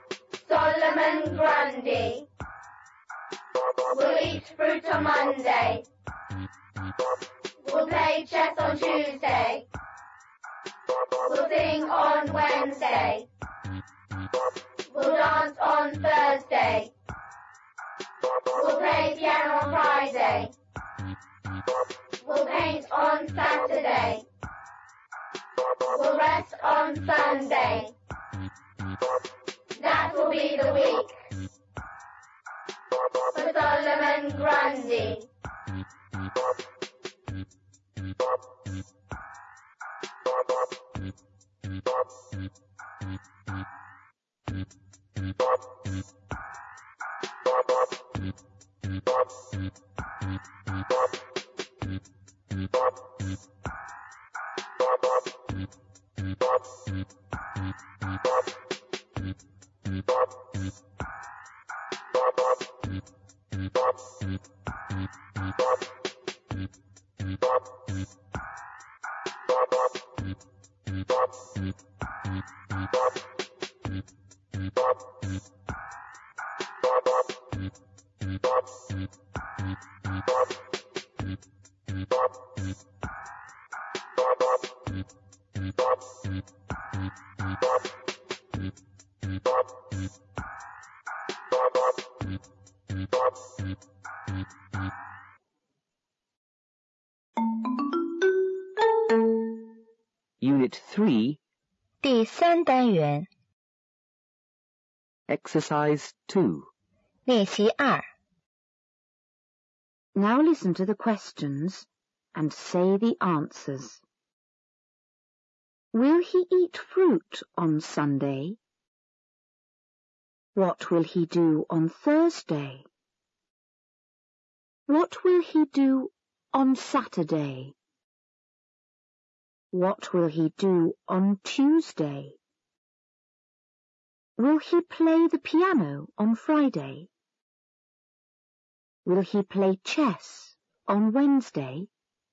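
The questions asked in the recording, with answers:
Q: Will he eat fruit on Sunday?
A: No, he will rest on Sunday.

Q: What will he do on Thursday?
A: He will dance.

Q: What will he do on Saturday?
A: He will paint.

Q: What will he do on Tuesday?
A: He will play chess.

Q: Will he play the piano on Friday?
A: Yes, he will.

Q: Will he play chess on Wednesday?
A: No, he will sing on Wednesday.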